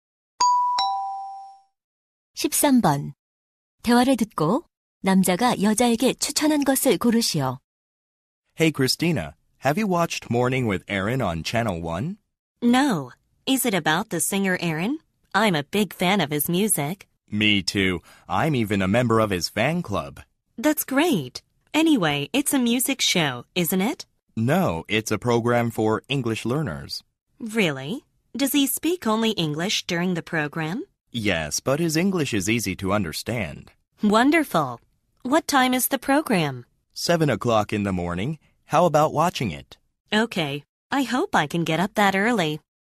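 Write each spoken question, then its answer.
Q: 대화를 듣고 남자가 여자에게 추천한 것을 고르시오.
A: 영어 학습 프로그램 Morning with Aaron 시청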